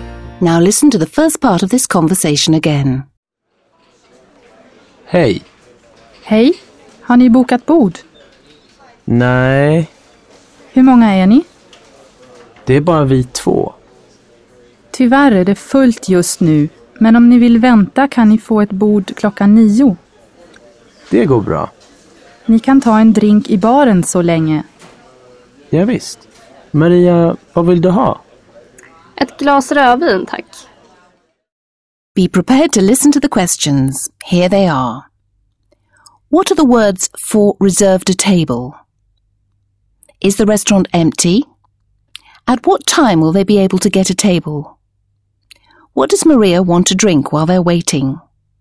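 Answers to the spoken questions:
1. bokat bord
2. No, it is full right now
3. At 9 o'clock
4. A glass of red wine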